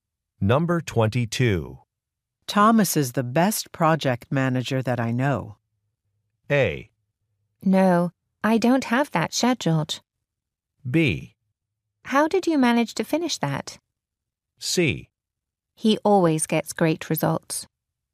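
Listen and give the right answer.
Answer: C: He always gets great results.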